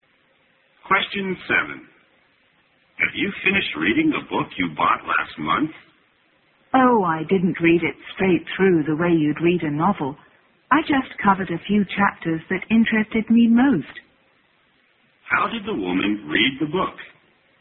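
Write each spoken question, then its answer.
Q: How did the woman read the book?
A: She read only a few chapters that interested her most.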